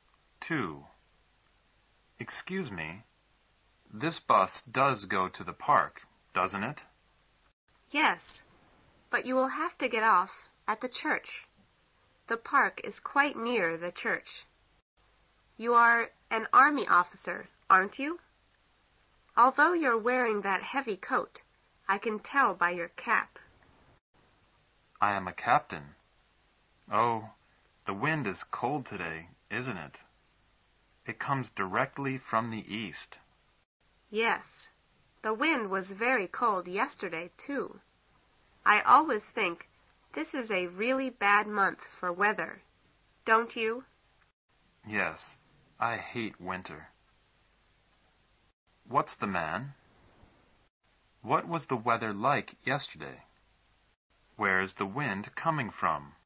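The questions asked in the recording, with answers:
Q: What's the man?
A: An army officer (a captain)

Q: What was the weather like yesterday?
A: Very cold and windy

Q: Where is the wind coming from?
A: From the east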